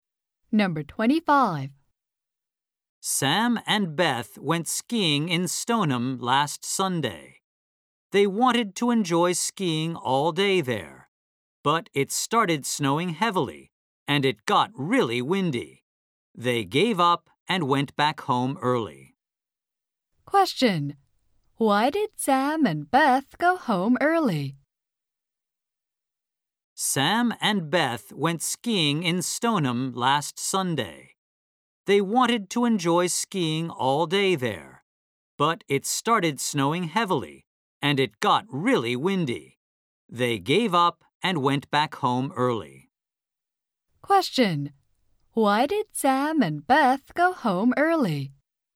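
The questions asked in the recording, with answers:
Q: Why did Sam and Beth go home early?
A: Because it started snowing heavily and got really windy.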